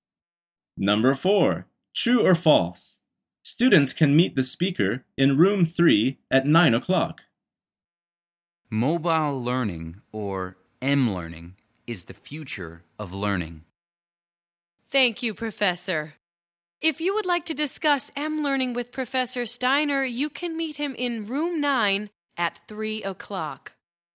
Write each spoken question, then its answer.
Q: True or false? Students can meet the speaker in room 3 at 9 o'clock.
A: The answer is false.